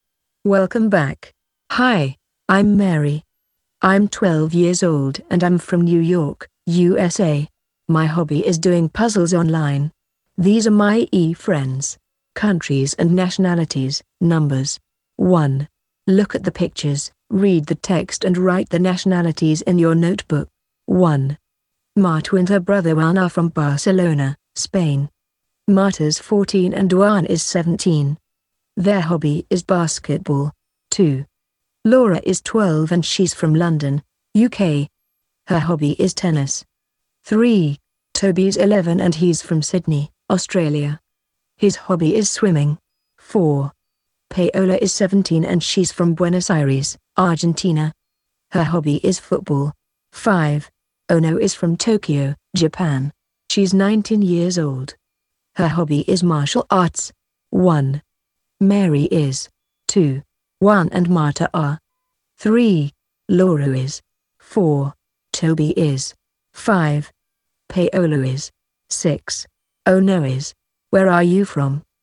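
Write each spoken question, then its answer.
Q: Mary is.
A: American

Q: Juan and Marta are.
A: Spanish

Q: Laura is.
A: British

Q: Toby is.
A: Australian

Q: Paolo is.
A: Argentinian

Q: Ono is.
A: Japanese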